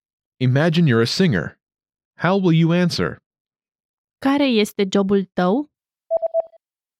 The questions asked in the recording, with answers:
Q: Care este jobul tău?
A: Eu sunt cântăreț.